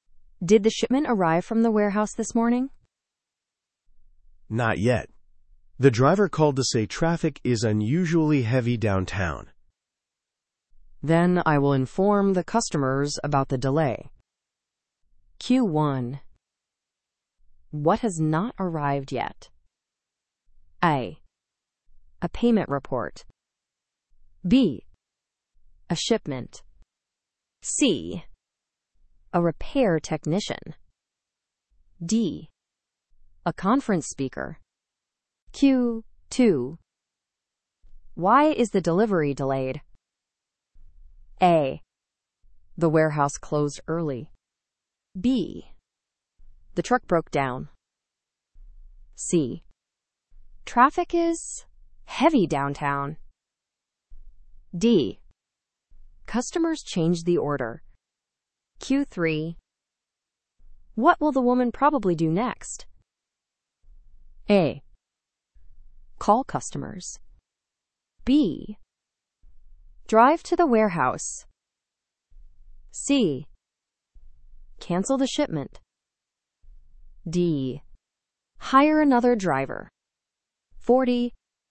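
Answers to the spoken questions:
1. B: A shipment.
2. C: Traffic is heavy downtown.
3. A: Call customers.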